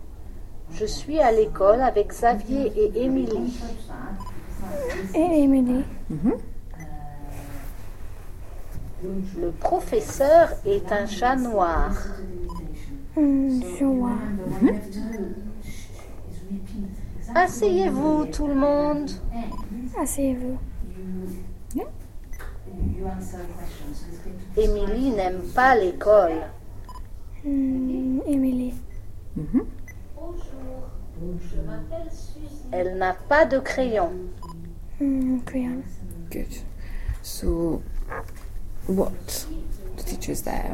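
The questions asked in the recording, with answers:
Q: what does he tell them to do?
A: Sit down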